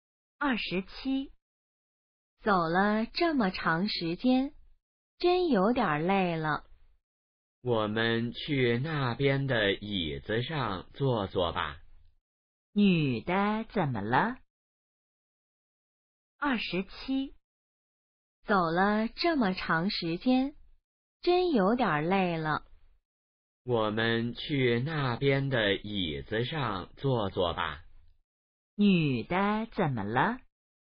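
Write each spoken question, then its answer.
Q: 女的怎么了?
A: 累了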